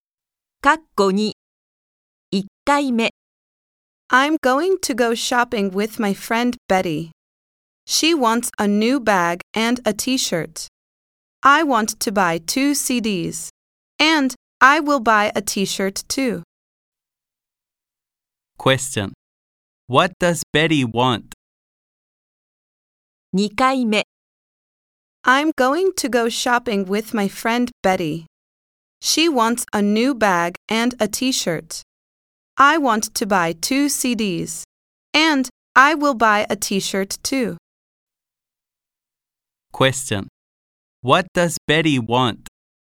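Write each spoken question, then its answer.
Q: What does Betty want?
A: A new bag and a T-shirt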